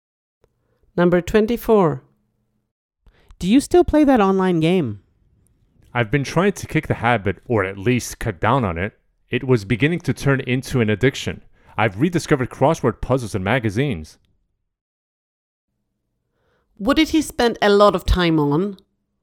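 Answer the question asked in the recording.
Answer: An online game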